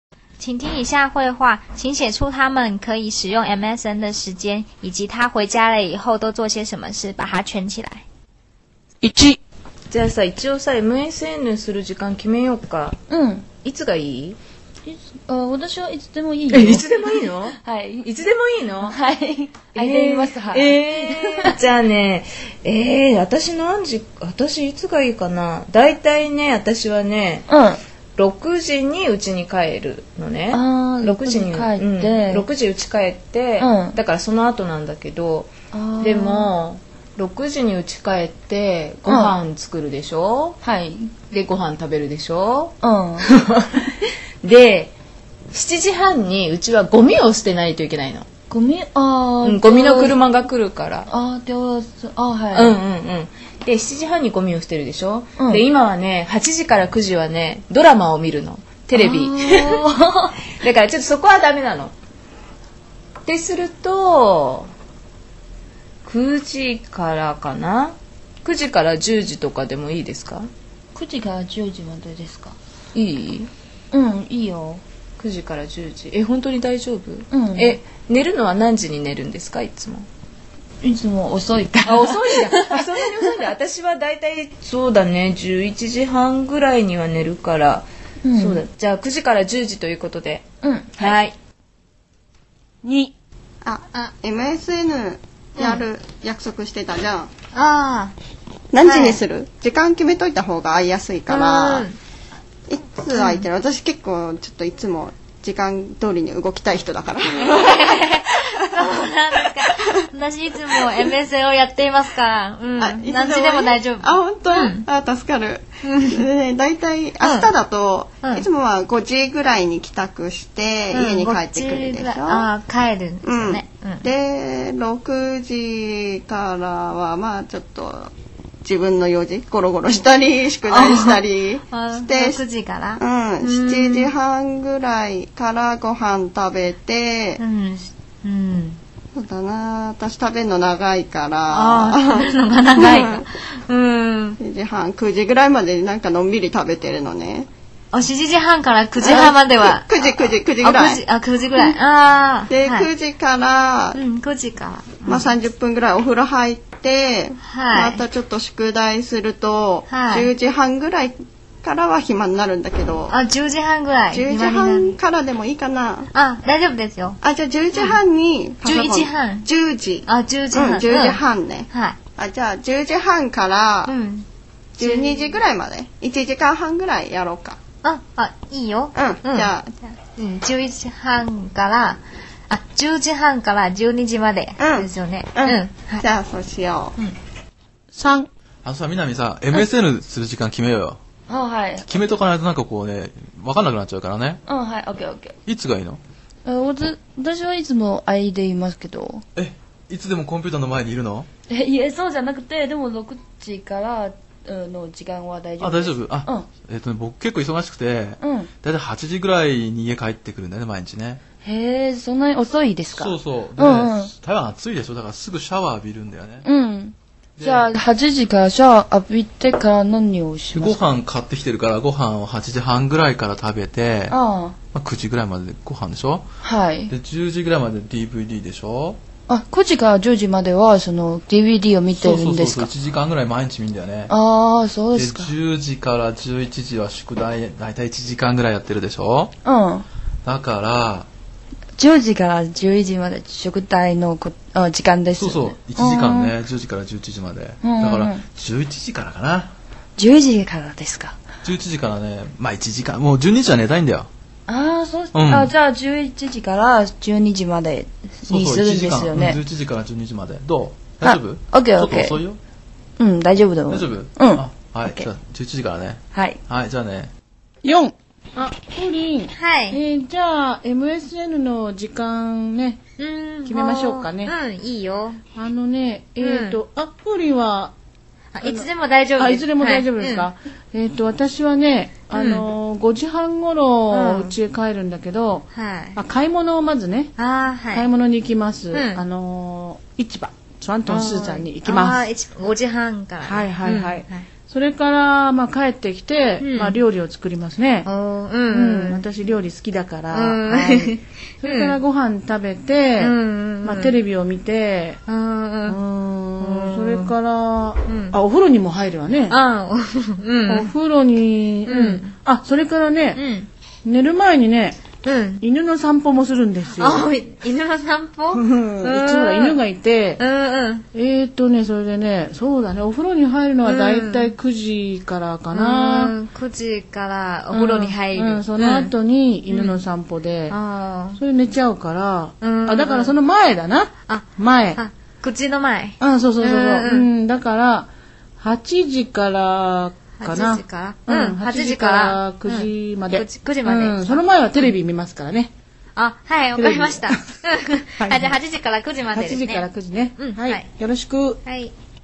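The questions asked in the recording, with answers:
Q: 请写出他们可以使用 MSN 的时间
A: 9点到10点

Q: 请写出他们可以使用 MSN 的时间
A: 10点半到12点

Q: 请写出他们可以使用 MSN 的时间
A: 11点到12点

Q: 请写出他们可以使用 MSN 的时间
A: 8点到9点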